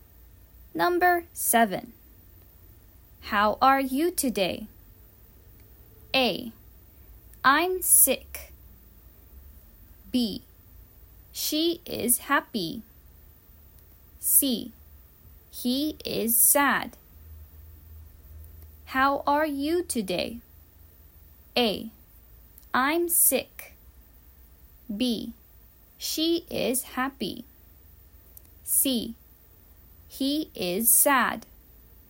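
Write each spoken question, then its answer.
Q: How are you today?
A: A: I'm sick.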